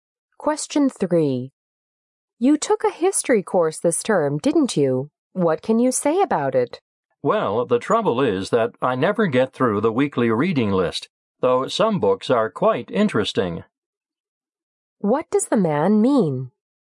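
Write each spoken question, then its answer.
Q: What does the man mean?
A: He can never finish the weekly reading list, which is too heavy.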